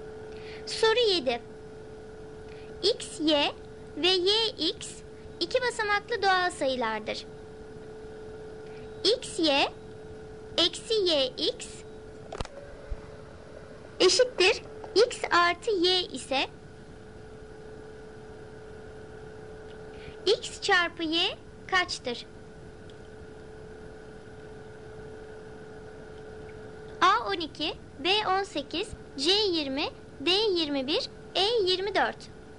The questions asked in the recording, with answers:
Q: x çarpı y kaçtır?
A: Doğru cevap C 20.